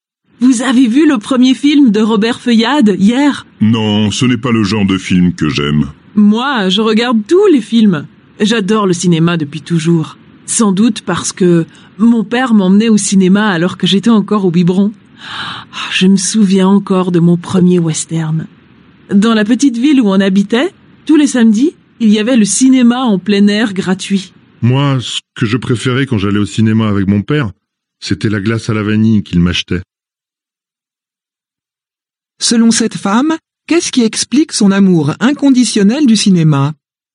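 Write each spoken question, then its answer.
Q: Selon cette femme, qu'est-ce qui explique son amour inconditionnel du cinéma ?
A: Son père l'emmenait au cinéma quand elle était toute petite (encore au biberon).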